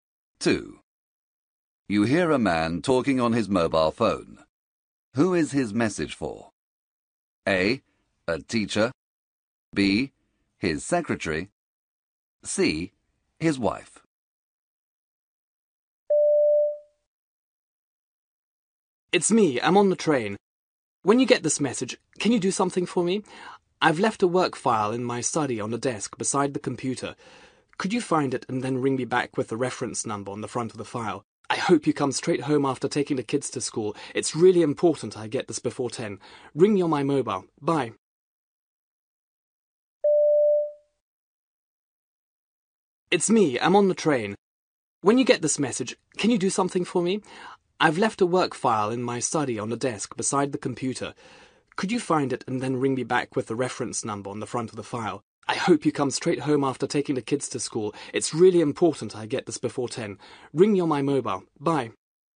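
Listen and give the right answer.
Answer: C: His wife.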